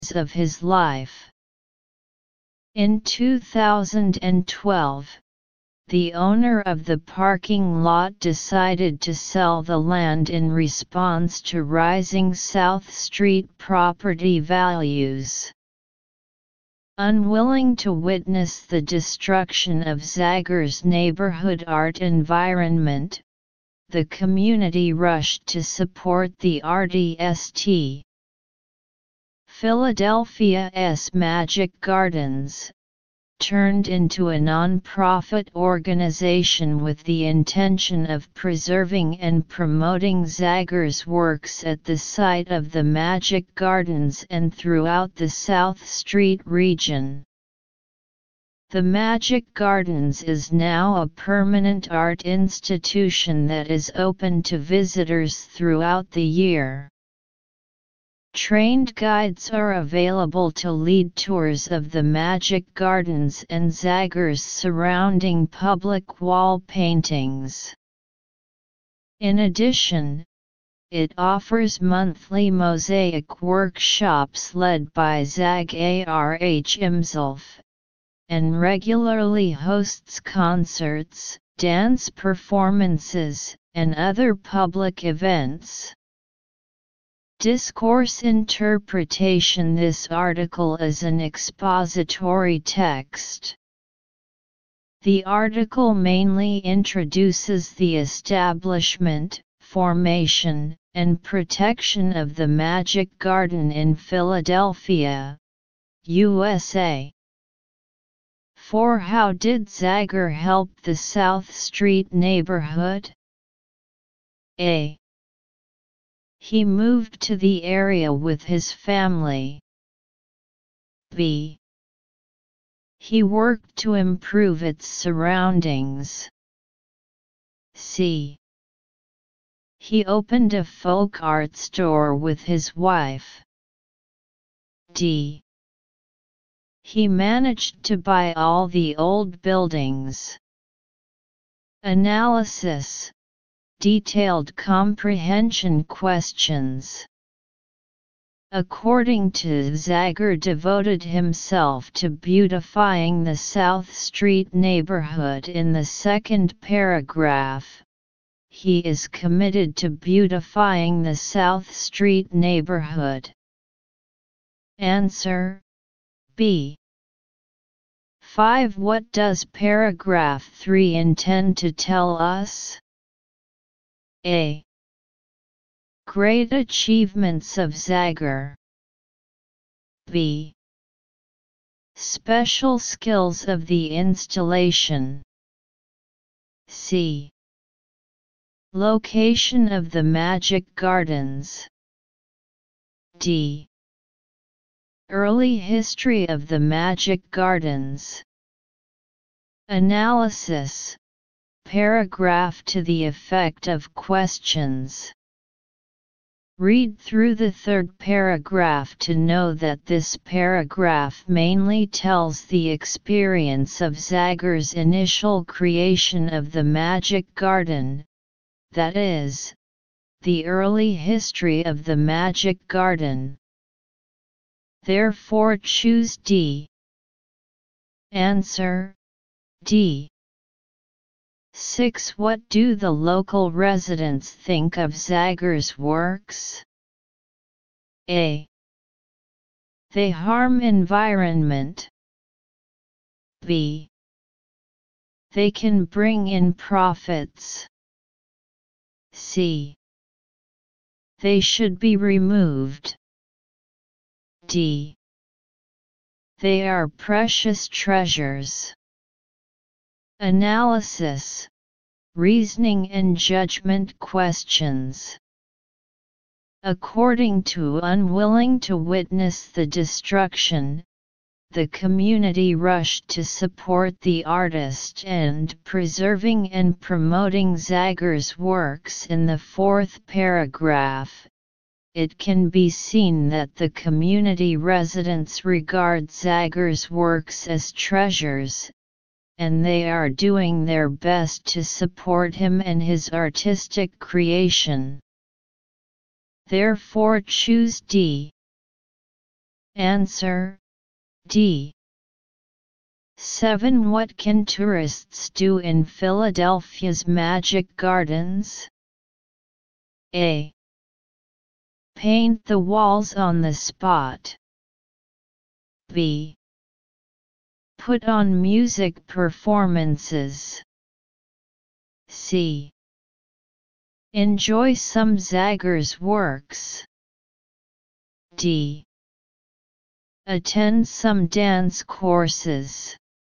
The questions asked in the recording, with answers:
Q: What do the local residents think of Zagger's works?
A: Therefore, choose D.

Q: What can tourists do in Philadelphia's Magic Gardens?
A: Answer C.